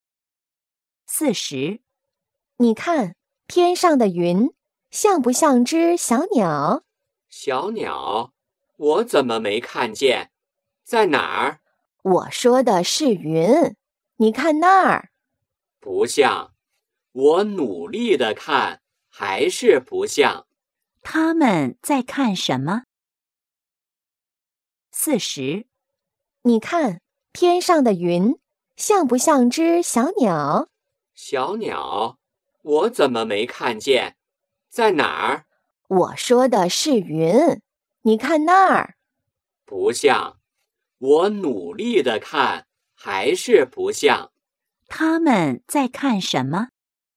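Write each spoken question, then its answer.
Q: 他们在看什么?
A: 天上的云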